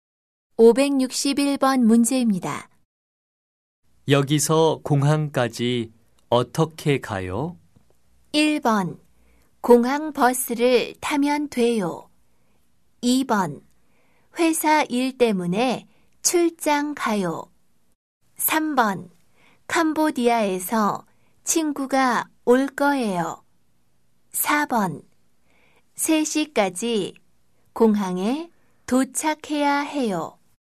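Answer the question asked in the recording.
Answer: 1: 공항 버스를 타면 돼요.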